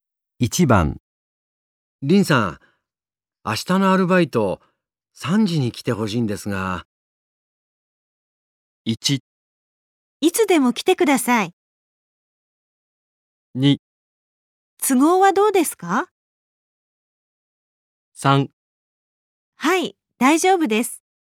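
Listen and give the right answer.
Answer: 3: はい、大丈夫です。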